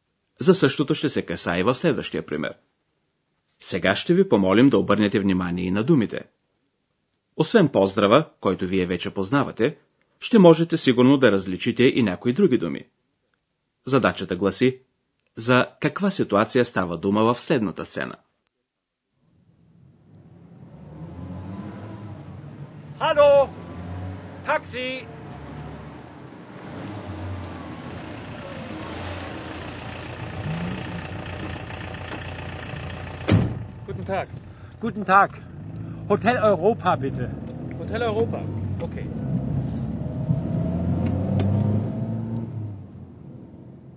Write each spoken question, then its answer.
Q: Задачата гласи за каква ситуация става дума в следната сцена.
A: Един човек стои на улицата, спира едно такси и казва на шофьора къде иска да отиде.